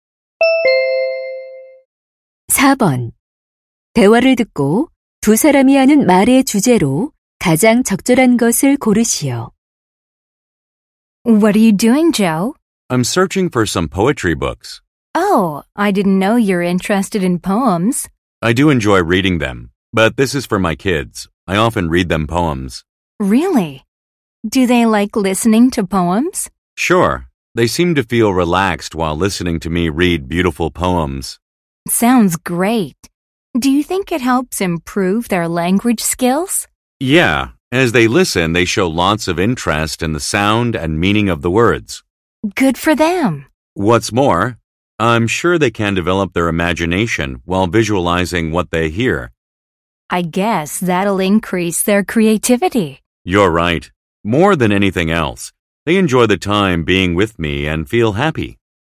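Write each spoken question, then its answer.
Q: 대화를 듣고 두 사람이 하는 말의 주제로 가장 적절한 것을 고르시오.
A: 아이들에게 시를 읽어 주는 것의 좋은 점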